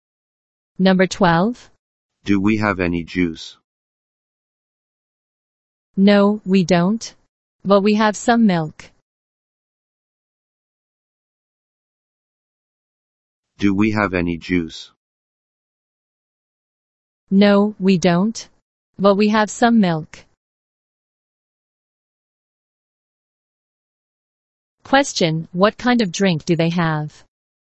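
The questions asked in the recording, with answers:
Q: Question, what kind of drink do they have?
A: Milk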